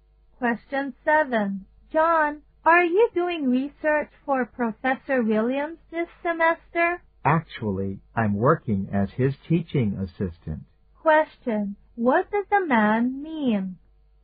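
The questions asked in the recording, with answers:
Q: What does the man mean?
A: He is not doing research; he is Professor Williams's teaching assistant.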